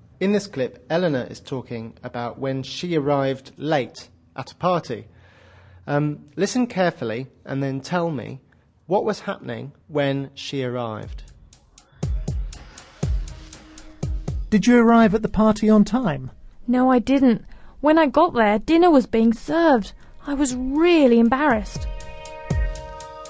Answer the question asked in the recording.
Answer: When Eleanor arrived at the restaurant, the waiters were already serving dinner.